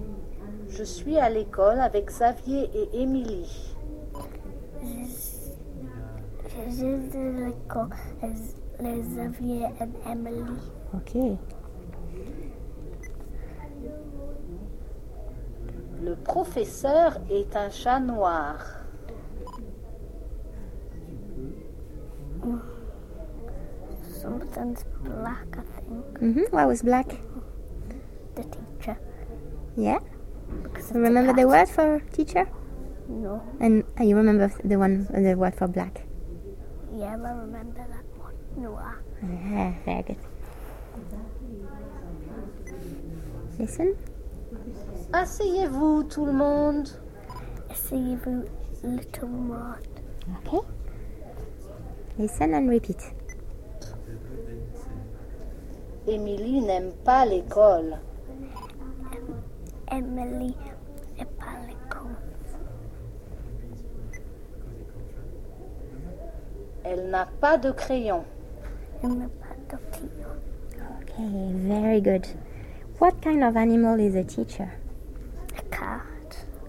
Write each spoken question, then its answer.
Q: What kind of animal is a teacher?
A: A cat.